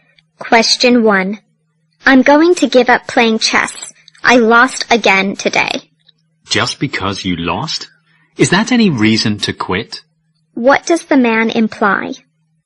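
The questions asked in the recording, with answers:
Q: What does the man imply?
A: Losing a game is no reason to give up playing chess.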